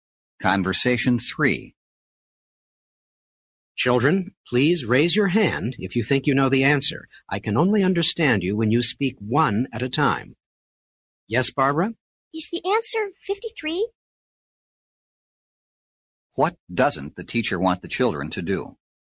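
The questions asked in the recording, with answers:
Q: What doesn't the teacher want the children to do?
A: Speak all at once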